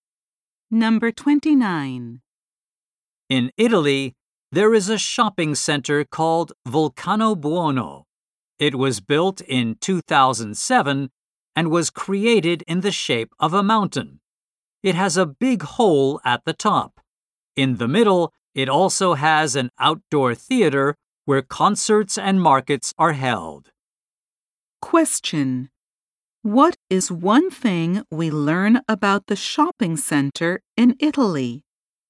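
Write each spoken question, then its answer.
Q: What is one thing we learn about the shopping center in Italy?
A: It is shaped like a mountain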